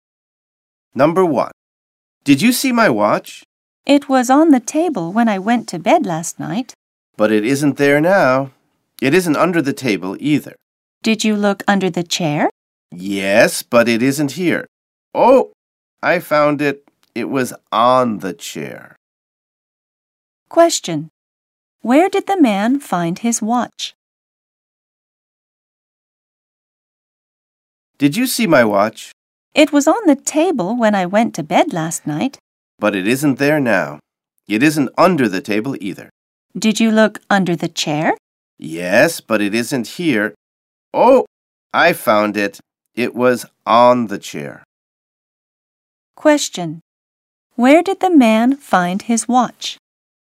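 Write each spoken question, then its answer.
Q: Where did the man find his watch?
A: On the chair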